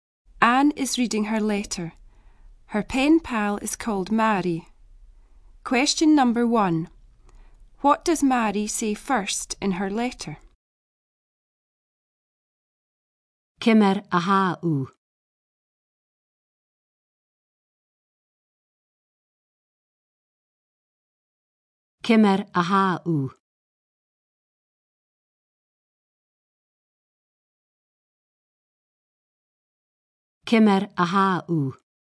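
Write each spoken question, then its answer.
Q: What does Mary say first in her letter?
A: How are you?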